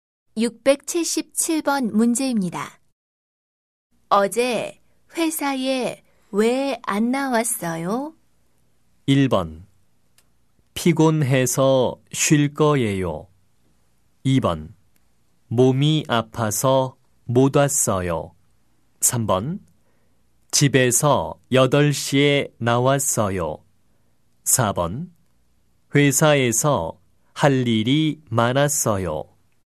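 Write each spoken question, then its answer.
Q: 어제 회사에 왜 안 나왔어요?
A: 2: 몸이 아파서 못 왔어요.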